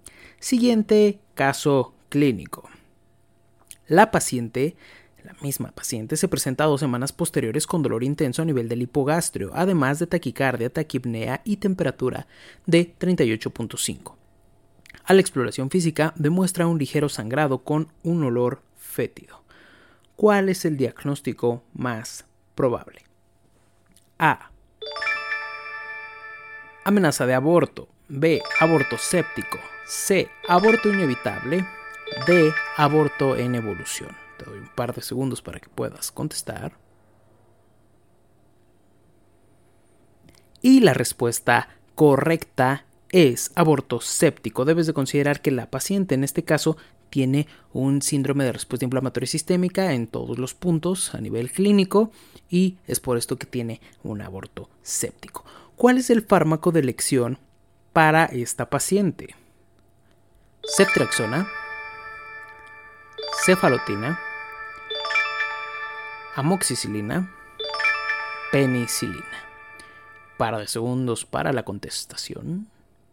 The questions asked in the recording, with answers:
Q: ¿Cuál es el diagnóstico más probable?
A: Y la respuesta correcta es aborto séptico.